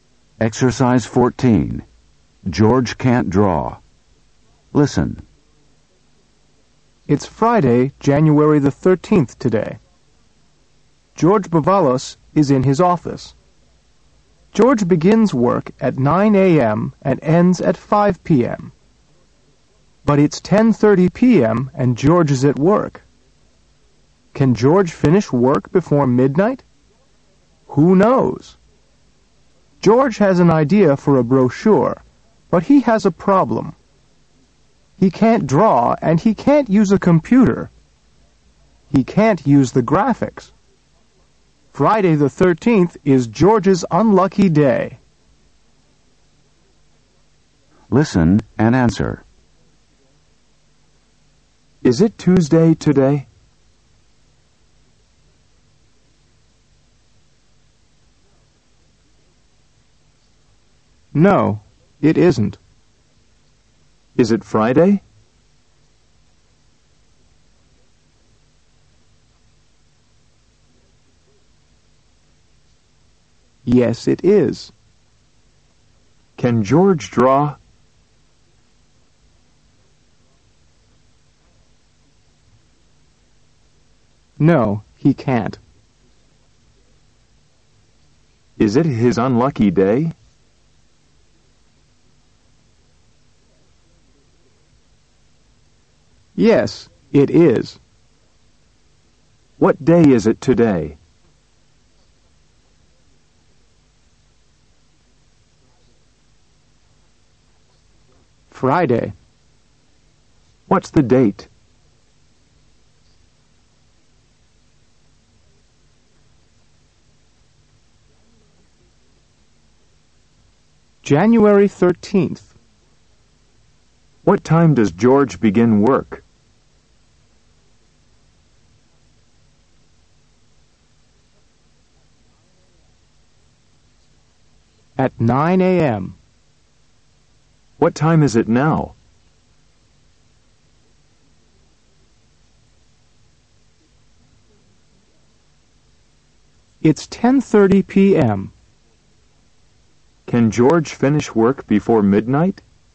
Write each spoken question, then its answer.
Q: Is it Tuesday today?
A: No, it isn't.

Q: Is it Friday?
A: Yes, it is.

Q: Can George draw?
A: No, he can't.

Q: Is it his unlucky day?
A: Yes, it is.

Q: What day is it today?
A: Friday.

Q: What's the date?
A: January 13th.

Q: What time does George begin work?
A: 9 a.m.

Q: What time is it now?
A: It's 10:30 p.m.

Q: Can George finish work before midnight?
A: Who knows?